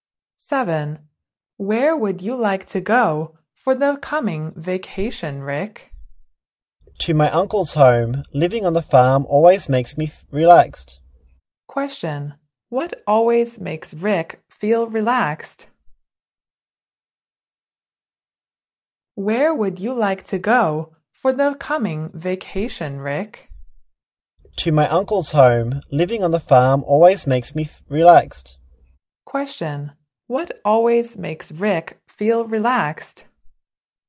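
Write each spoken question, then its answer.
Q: what always makes Rick feel relaxed?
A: Living on the farm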